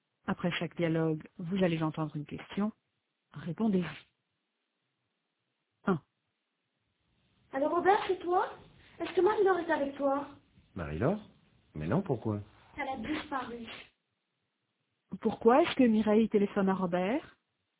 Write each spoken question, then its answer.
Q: Pourquoi est-ce que Mireille téléphone à Robert ?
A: Parce que Marie-Laure a disparu.